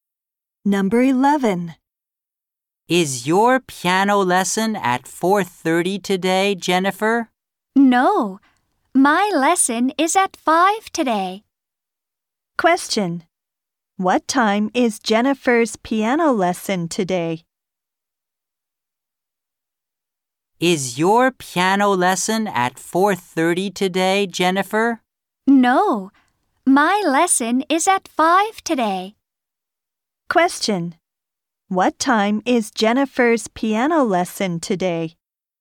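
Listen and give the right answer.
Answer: At 5.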